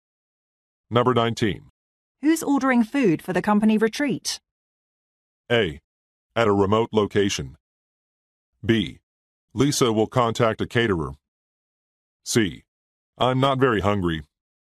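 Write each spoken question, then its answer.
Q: Who's ordering food for the company retreat?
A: B: Lisa will contact a caterer.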